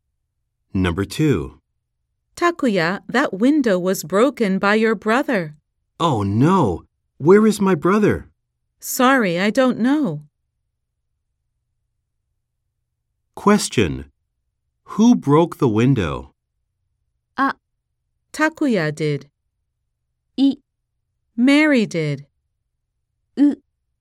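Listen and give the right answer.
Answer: U: Takuya's brother did.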